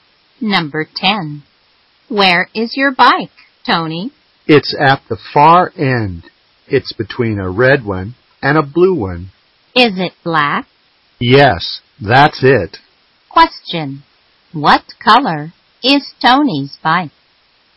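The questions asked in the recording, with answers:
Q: Question. What color is Tony's bike?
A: Black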